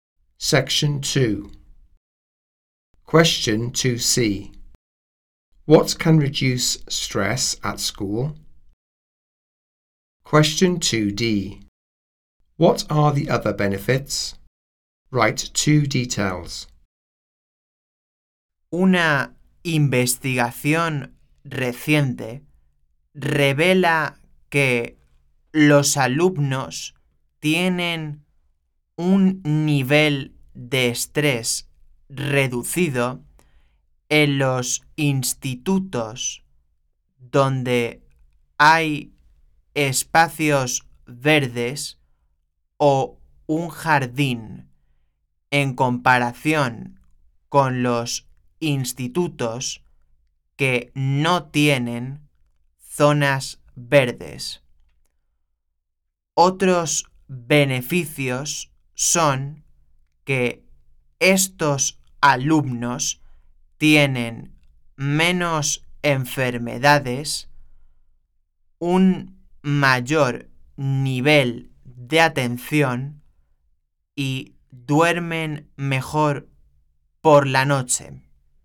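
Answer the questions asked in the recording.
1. Green spaces or a garden
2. Fewer illnesses, better attention, sleep better at night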